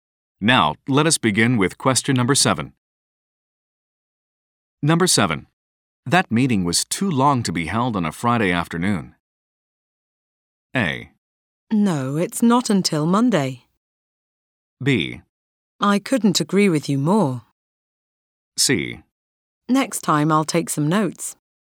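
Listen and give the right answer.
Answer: B: I couldn't agree with you more.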